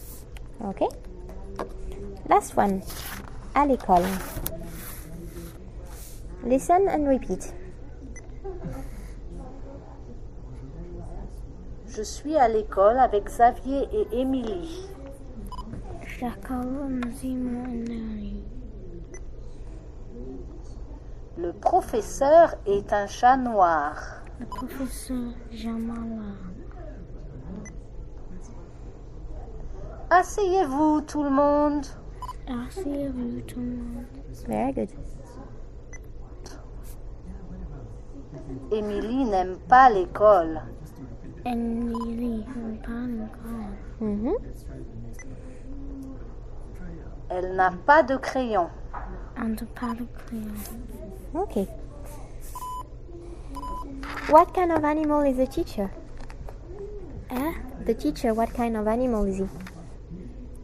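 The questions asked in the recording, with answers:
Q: What kind of animal is the teacher?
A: A black cat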